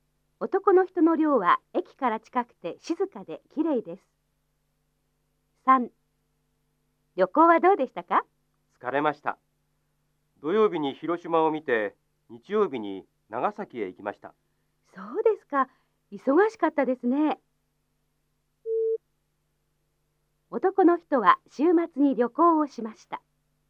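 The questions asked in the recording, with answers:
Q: 男の人は週末に旅行をしました。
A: ○ (土曜日に広島、日曜日に長崎へ行った)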